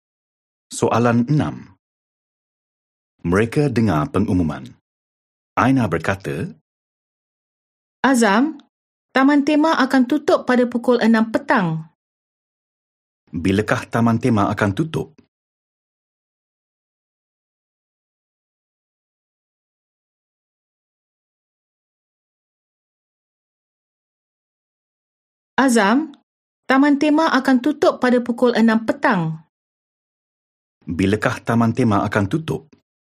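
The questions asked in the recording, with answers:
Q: Bilakah taman tema akan tutup?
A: Pukul 6 petang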